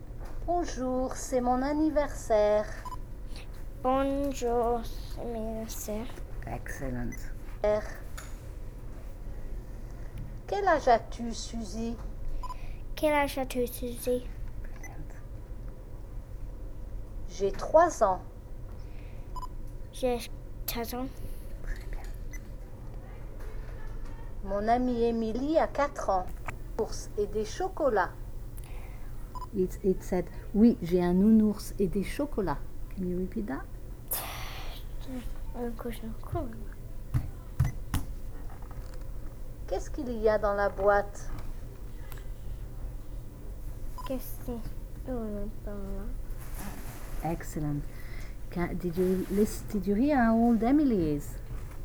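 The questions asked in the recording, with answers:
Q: Did you hear how old Emily is?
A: 4 years old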